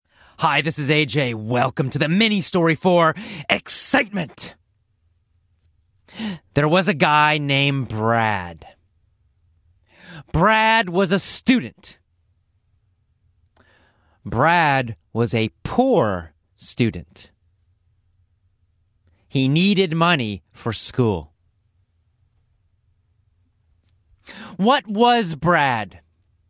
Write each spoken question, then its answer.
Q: What was Brad?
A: A student. Brad was a student.